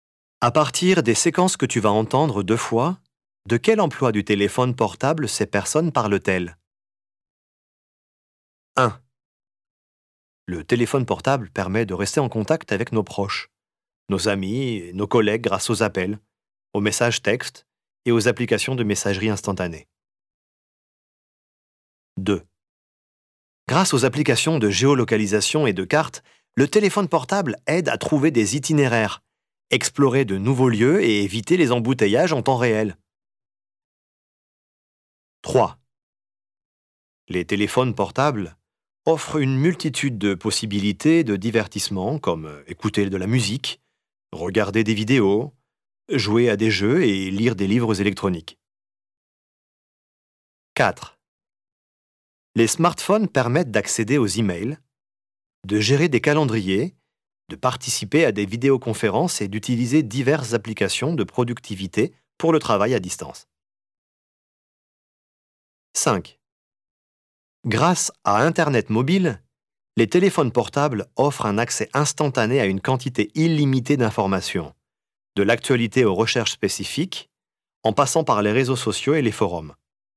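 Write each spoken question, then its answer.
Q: de quel emploi du téléphone portable ces personnes parlent-elles?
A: la communication (rester en contact avec ses proches)

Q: de quel emploi du téléphone portable ces personnes parlent-elles?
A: la navigation / l'orientation (géolocalisation et cartes)

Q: de quel emploi du téléphone portable ces personnes parlent-elles?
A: le divertissement

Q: de quel emploi du téléphone portable ces personnes parlent-elles?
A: le travail (travail à distance, productivité)

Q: de quel emploi du téléphone portable ces personnes parlent-elles?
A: l'accès à l'information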